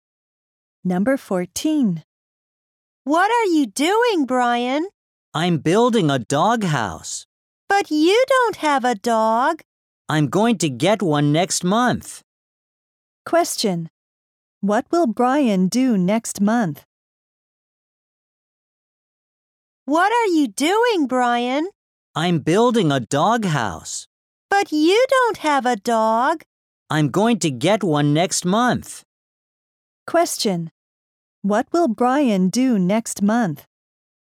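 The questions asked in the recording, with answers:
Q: What will Brian do next month?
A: Get a dog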